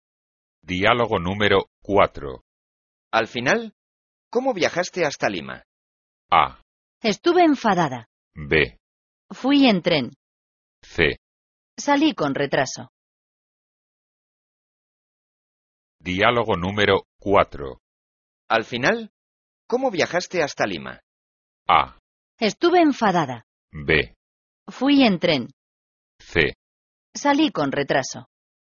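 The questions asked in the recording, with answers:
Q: Al final, ¿cómo viajaste hasta Lima?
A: B: Fui en tren.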